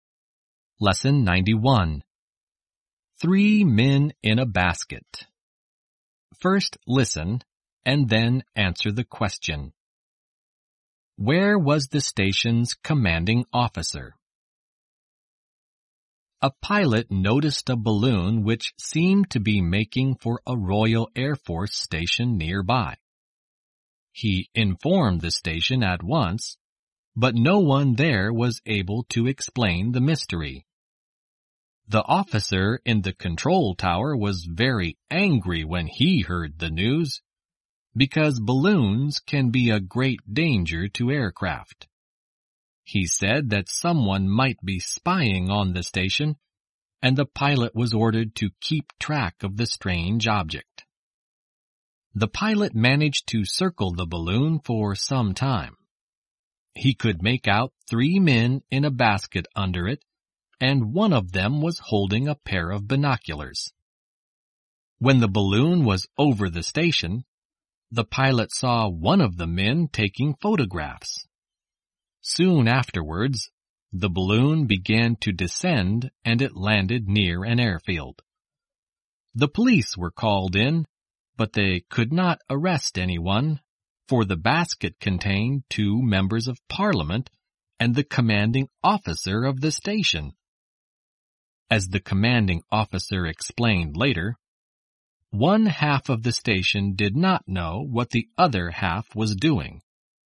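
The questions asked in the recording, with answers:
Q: Where was the station's commanding officer?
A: In the balloon's basket, with two members of parliament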